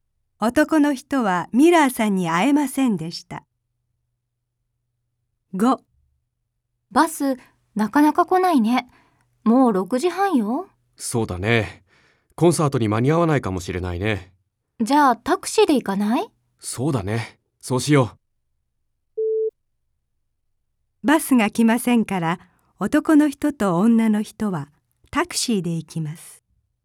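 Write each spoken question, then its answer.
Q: バスが来ませんから、男の人と女の人はタクシーで行きます。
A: ○(正しい)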